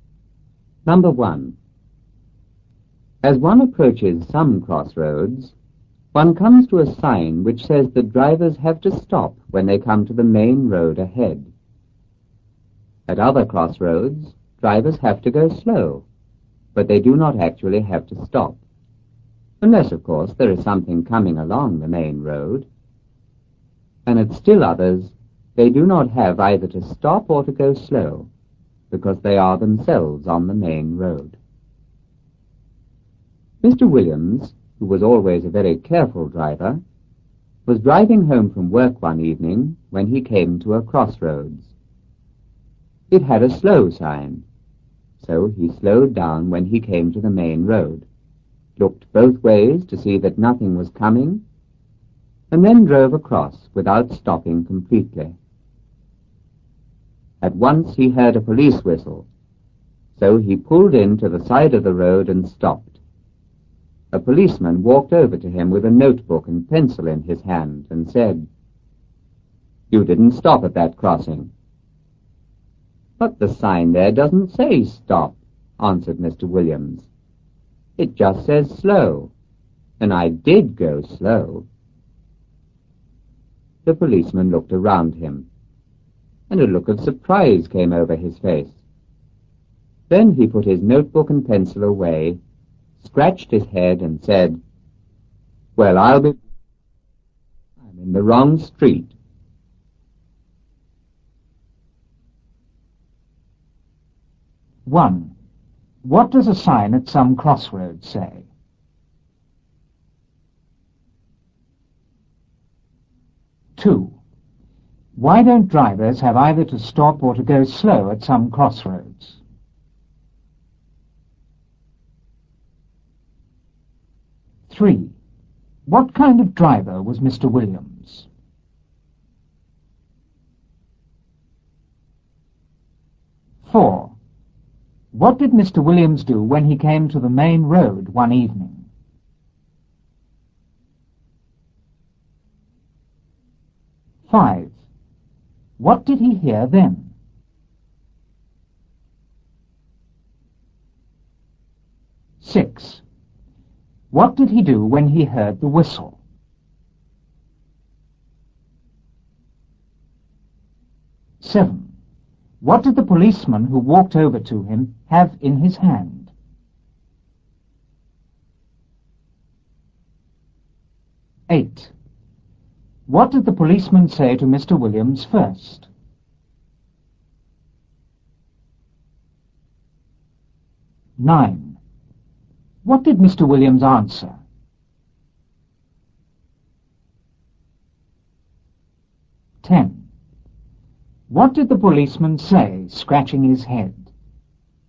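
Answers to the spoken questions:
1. That drivers have to stop when they come to the main road ahead
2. Because they are themselves on the main road
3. A very careful driver
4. He slowed down, looked both ways, and drove across without stopping completely
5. A police whistle
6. He pulled in to the side of the road and stopped
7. A notebook and pencil
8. You didn't stop at that crossing
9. The sign doesn't say stop, it just says slow, and he did go slow
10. Well, I'm in the wrong street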